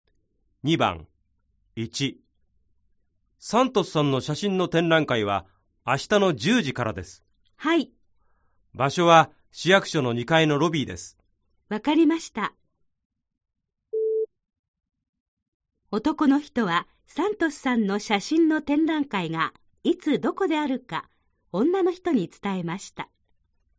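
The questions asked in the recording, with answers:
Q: 男の人はサントスさんの写真の展覧会がいつどこであるか女の人に伝えました。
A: ○(正しい)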